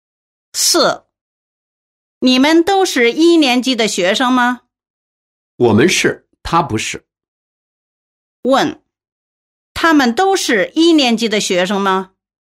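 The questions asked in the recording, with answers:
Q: 问,他们都是1年级的学生吗?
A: 不都是,他不是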